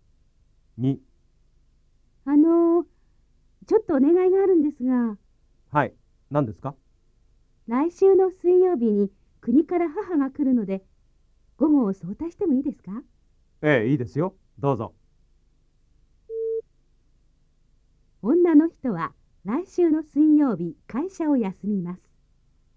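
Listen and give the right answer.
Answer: ×(午後早退するだけ)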